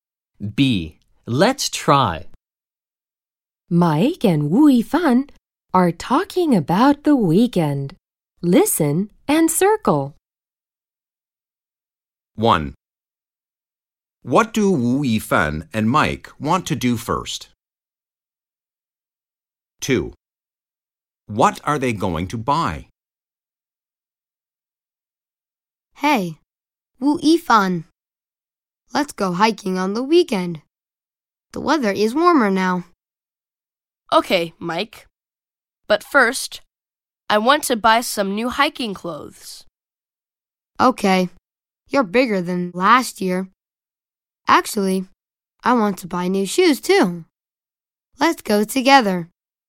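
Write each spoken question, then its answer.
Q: What do Wu Yifan and Mike want to do first?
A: Buy some new hiking clothes

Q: What are they going to buy?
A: New hiking clothes and new shoes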